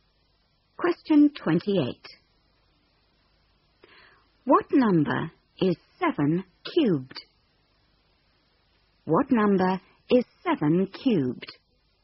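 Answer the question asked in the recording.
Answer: 343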